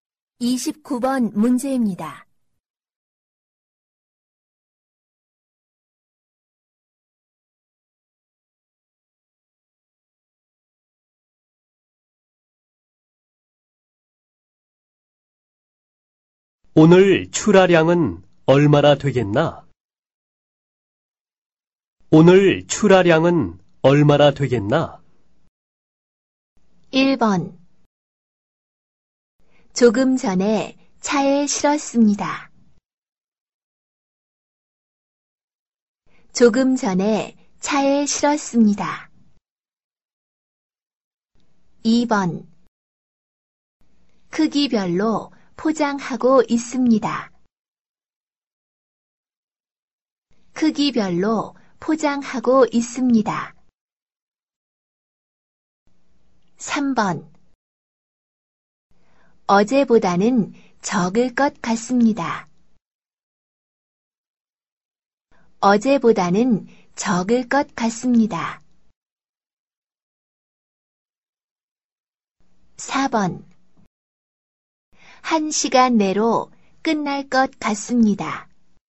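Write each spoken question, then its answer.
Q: 오늘 출하량은 얼마나 되겠나?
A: 3: 어제보다는 적을 것 같습니다.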